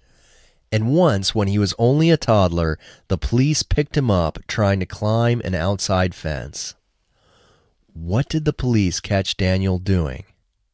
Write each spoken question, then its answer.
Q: What did the police catch Daniel doing?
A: The police caught Daniel trying to climb an outside fence.